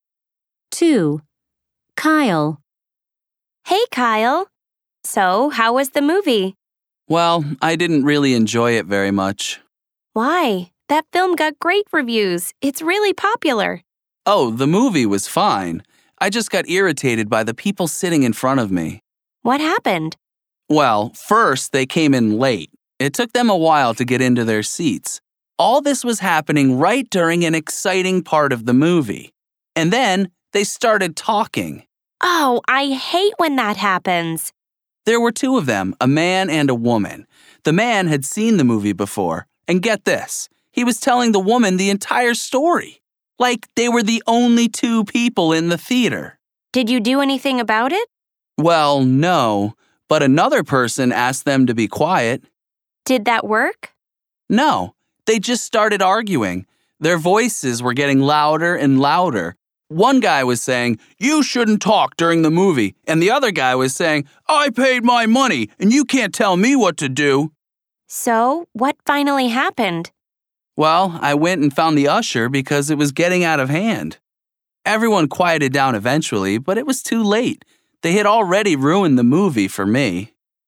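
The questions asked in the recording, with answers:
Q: 2. Kyle.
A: People in front of him at the movie came in late and talked during the movie.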